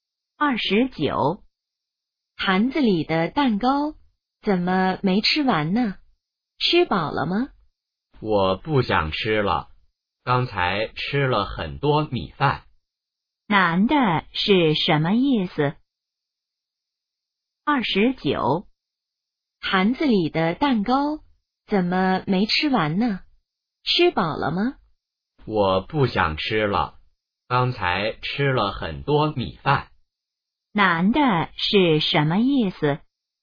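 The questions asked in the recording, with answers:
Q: 男的是什么意思?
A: 吃饱了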